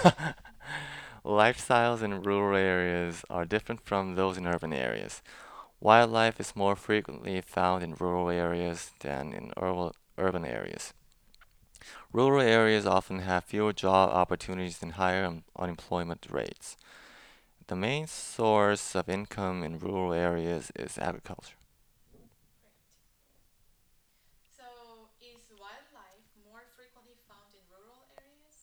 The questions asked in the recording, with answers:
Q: So, is wildlife more frequently found in rural areas?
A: yeah, wildlives are many in rural areas.